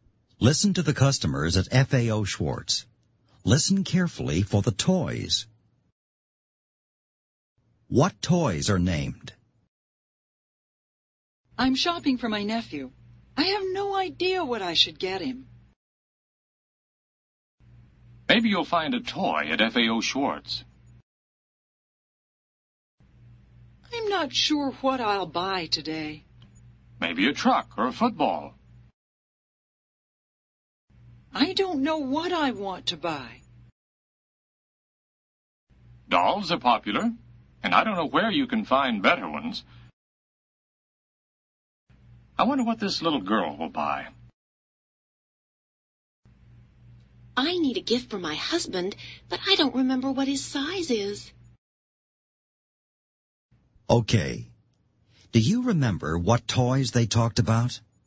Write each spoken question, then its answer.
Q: What toys are named?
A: A truck, a football, and dolls.